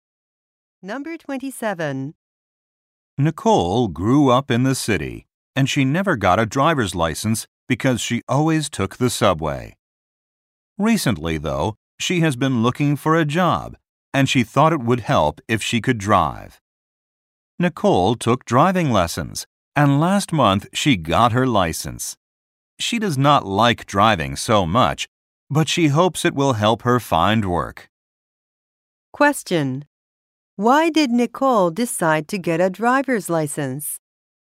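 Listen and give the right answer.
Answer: She thought it would help her find a job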